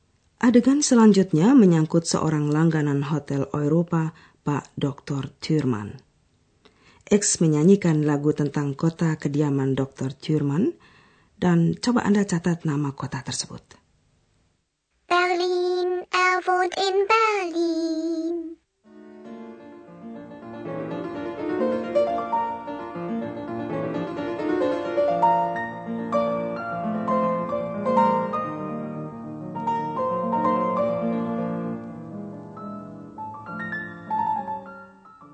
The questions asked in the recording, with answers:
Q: coba Anda catat nama kota tersebut.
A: Yang kelima adalah nama kota, yaitu Berlin.